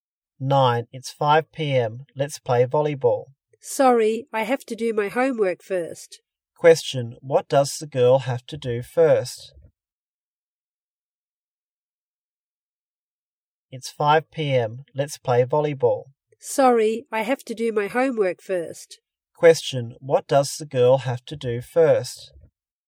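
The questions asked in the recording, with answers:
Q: what does the girl have to do first?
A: Do her homework.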